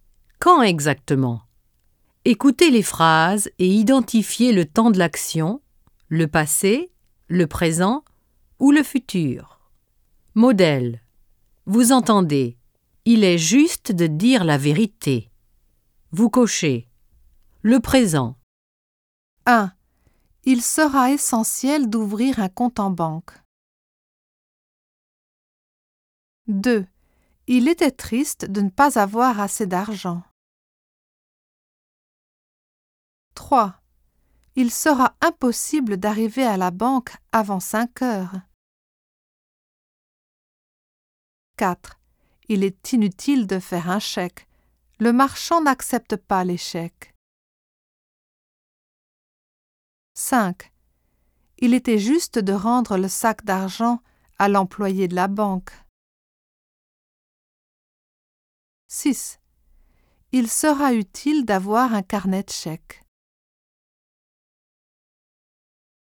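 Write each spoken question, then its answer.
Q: Il sera essentiel d'ouvrir un compte en banque.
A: le futur

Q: Il était triste de ne pas avoir assez d'argent.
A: le passé

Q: Il sera impossible d'arriver à la banque avant 5 heures.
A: le futur

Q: Il est inutile de faire un chèque.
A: le présent

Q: Il était juste de rendre le sac d'argent à l'employé de la banque.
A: le passé

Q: Il sera utile d'avoir un carnet de chèques.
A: le futur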